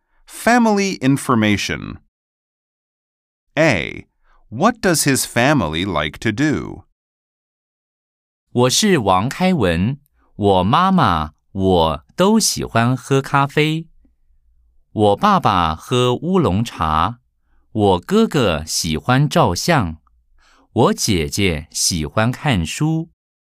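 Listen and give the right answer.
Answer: He and his mom like drinking coffee, his dad drinks oolong tea, his older brother likes taking photos, and his older sister likes reading.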